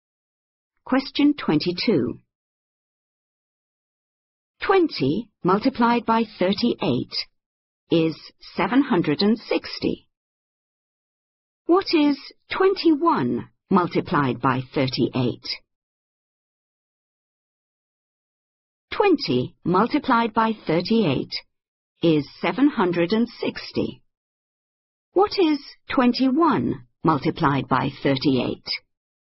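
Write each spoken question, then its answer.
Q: What is 21 multiplied by 38?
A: 798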